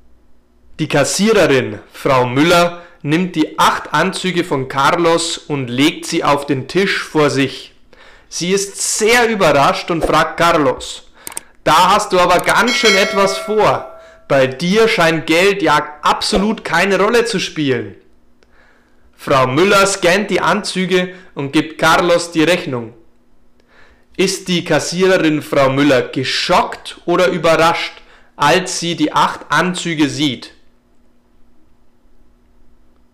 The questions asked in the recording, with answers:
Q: Ist die Kassiererin Frau Müller geschockt oder überrascht, als sie die 8 Anzüge sieht?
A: Sie ist überrascht.